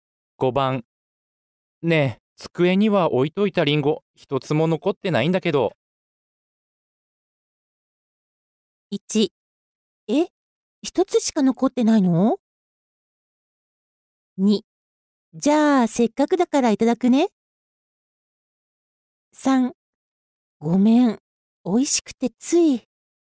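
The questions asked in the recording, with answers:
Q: ねえ、机には置いといたリンゴ一つも残ってないんだけど。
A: 3: ごめん、おいしくてつい。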